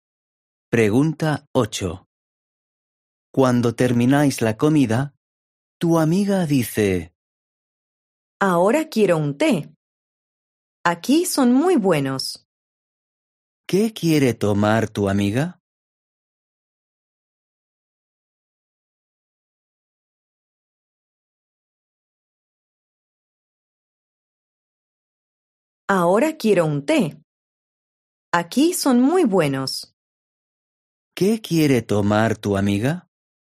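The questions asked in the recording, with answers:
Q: ¿Qué quiere tomar tu amiga?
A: Un té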